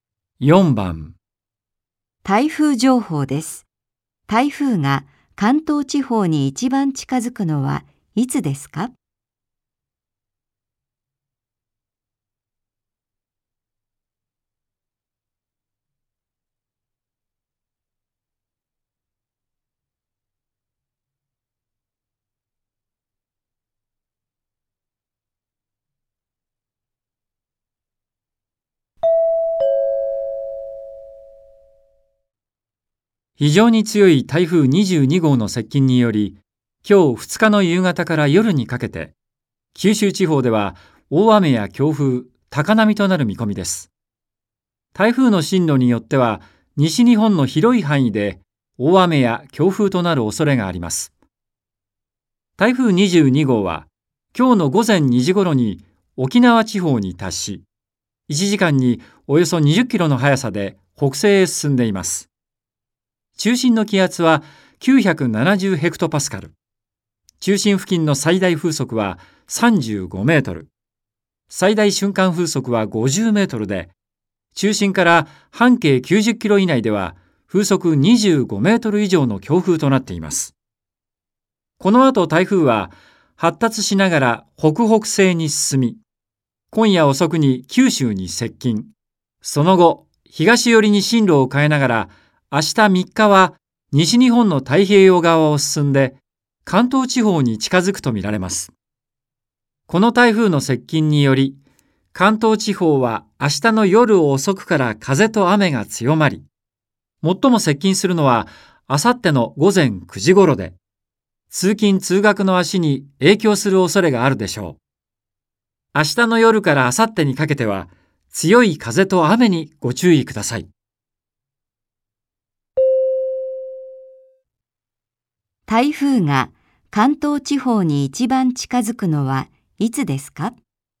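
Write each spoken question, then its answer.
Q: 台風が関東地方に一番近づくのはいつですか?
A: 明後日(4日)の午前9時頃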